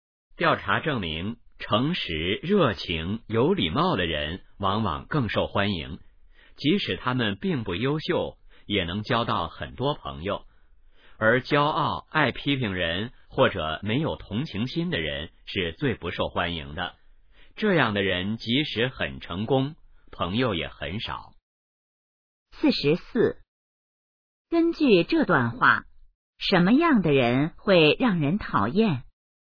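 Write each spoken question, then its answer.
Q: 根据这段话,什么样的人会让人讨厌?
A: 骄傲、爱批评人或者没有同情心的人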